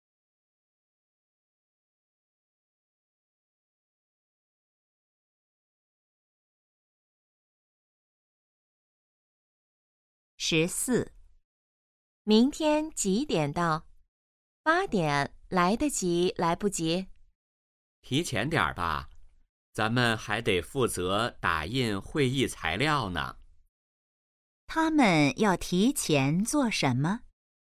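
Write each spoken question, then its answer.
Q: 他们要提前做什么?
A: 打印会议材料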